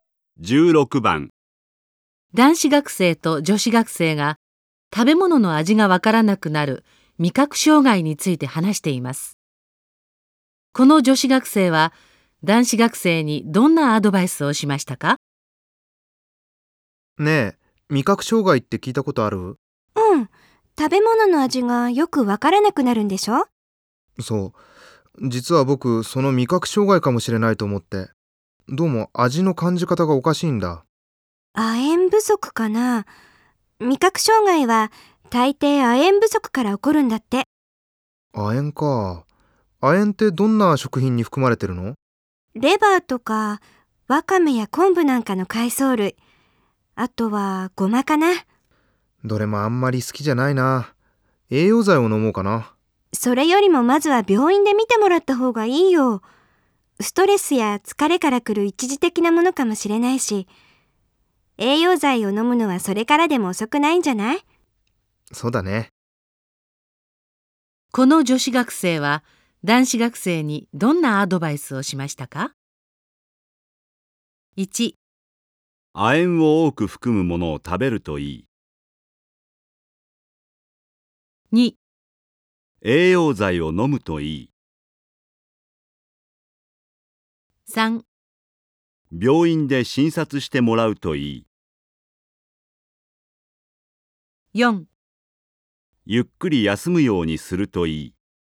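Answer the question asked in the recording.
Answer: 3: 病院で診察してもらうといい。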